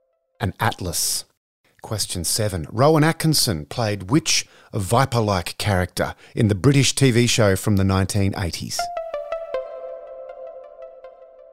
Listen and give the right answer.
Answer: Black Adder.